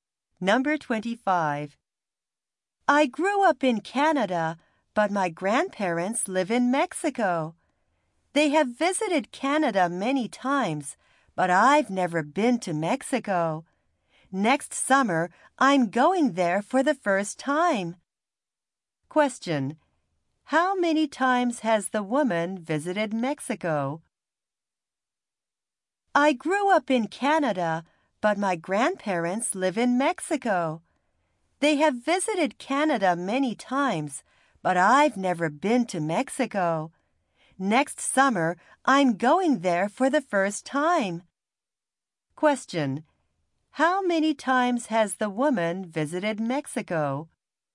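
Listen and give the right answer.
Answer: Never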